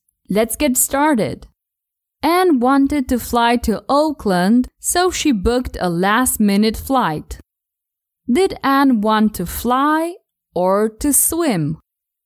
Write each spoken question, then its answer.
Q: Did Anne want to fly or to swim?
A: She wanted to fly, not to swim.